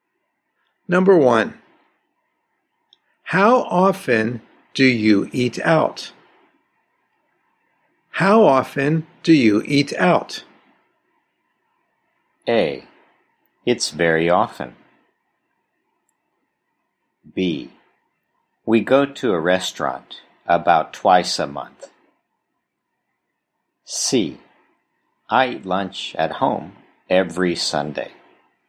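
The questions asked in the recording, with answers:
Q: How often do you eat out?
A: B: We go to a restaurant about twice a month.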